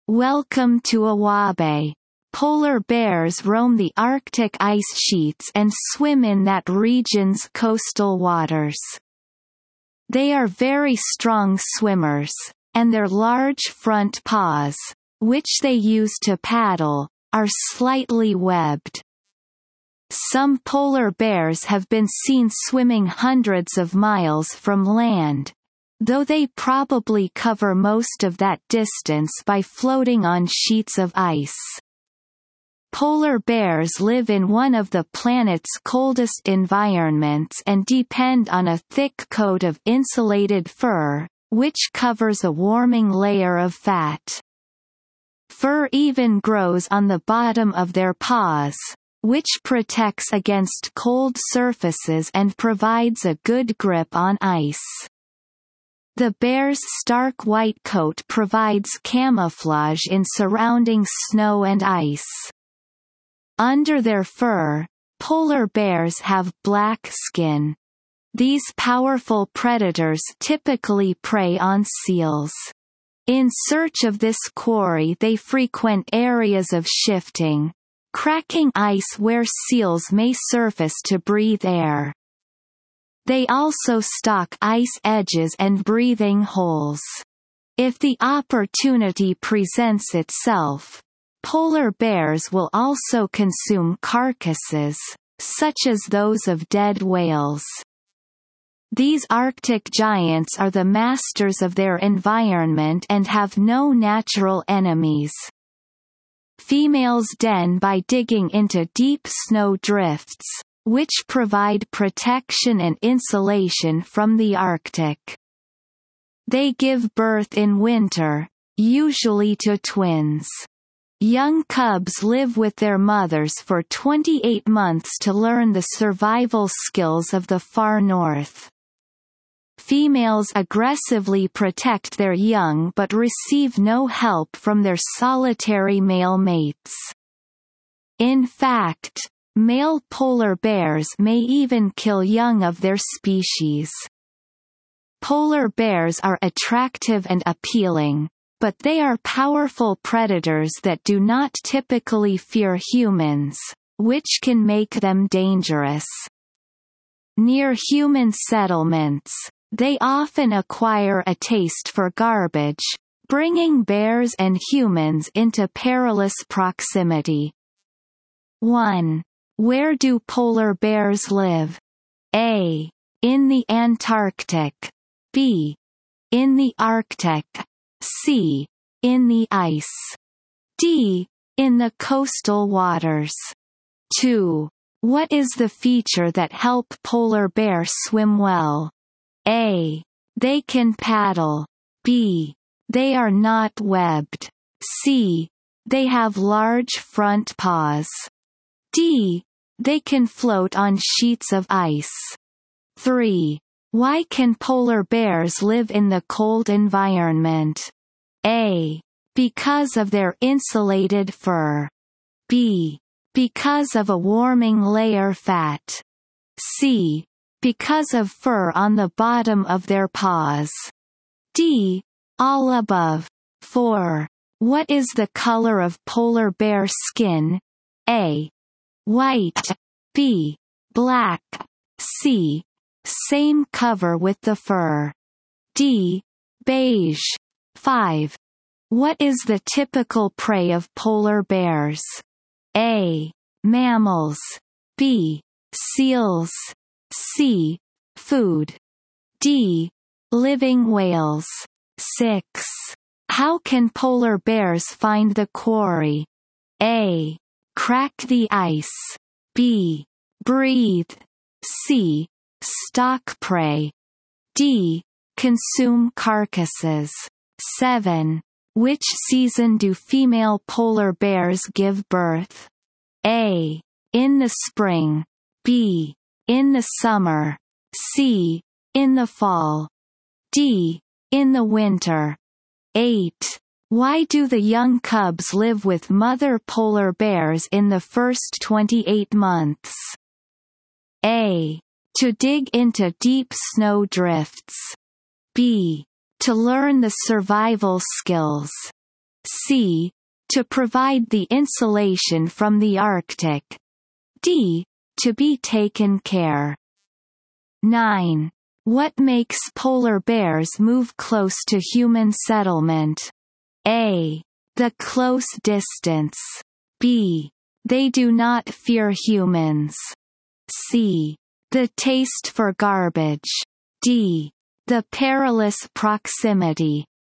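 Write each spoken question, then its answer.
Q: Where do polar bears live?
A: B: In the Arctic.

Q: Why can polar bears live in the cold environment?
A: D: All above.

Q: What is the color of polar bear skin?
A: B: Black.

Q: What is the typical prey of polar bears?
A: B: Seals.

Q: Which season do female polar bears give birth?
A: D: In the winter.

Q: Why do the young cubs live with mother polar bears in the first 28 months?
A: B: To learn the survival skills.

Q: What makes polar bears move close to human settlement?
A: C: The taste for garbage.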